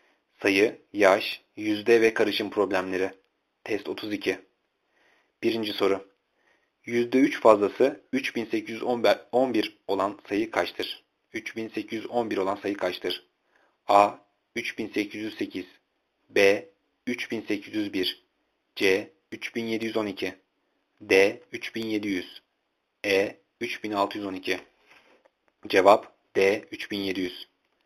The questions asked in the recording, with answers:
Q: %3 fazlası 3811 olan sayı kaçtır?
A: Cevap D. 3700.